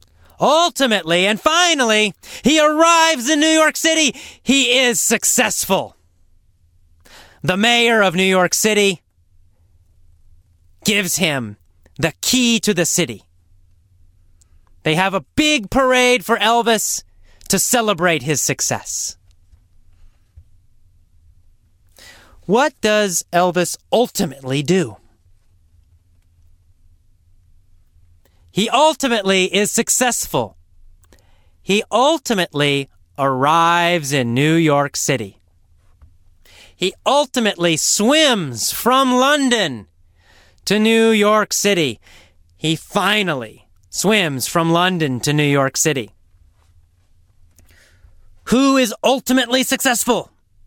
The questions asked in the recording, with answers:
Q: Who is ultimately successful?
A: Elvis. Elvis the Spider is ultimately successful.